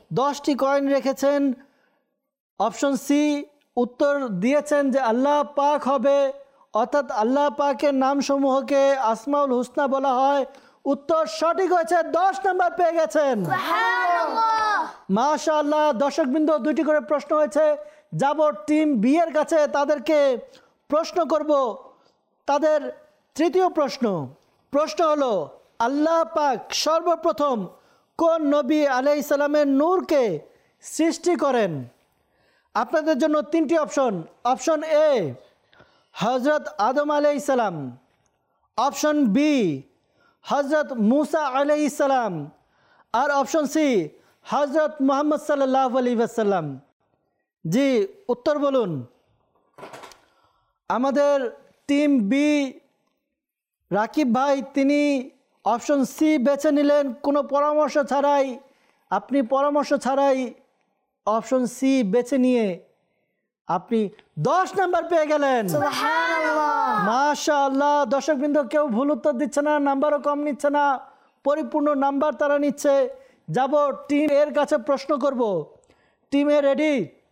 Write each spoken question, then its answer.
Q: আল্লাহ পাক সর্বপ্রথম কোন নবী আলাইহিস সালামের নূরকে সৃষ্টি করেন?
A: তিনি option সি বেছে নিলেন